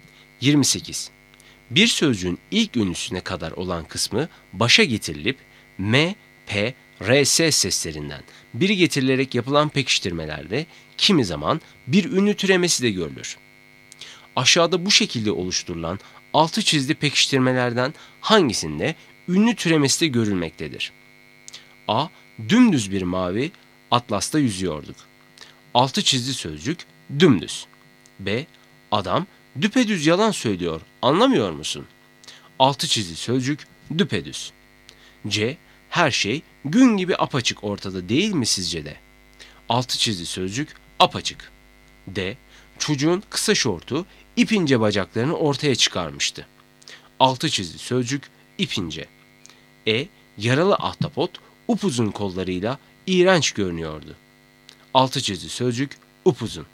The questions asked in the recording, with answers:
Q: Aşağıda bu şekilde oluşturulan altı çizgi pekiştirmelerden hangisinde ünlü türemesi de görülmektedir?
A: Doğru cevap B. Adam düpedüz yalan söylüyor.